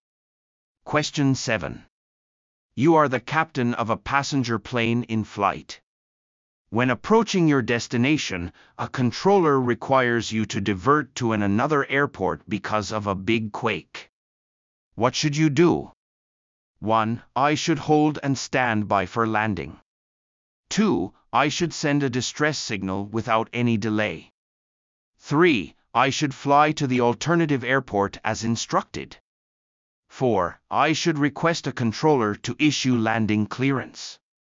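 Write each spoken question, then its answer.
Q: What should you do?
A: 3: I should fly to the alternative airport as instructed.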